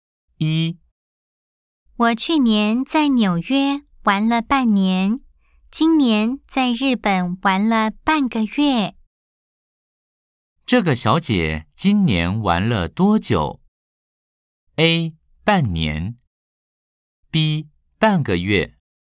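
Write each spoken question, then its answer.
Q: 这个小姐今年玩了多久?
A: B: 半个月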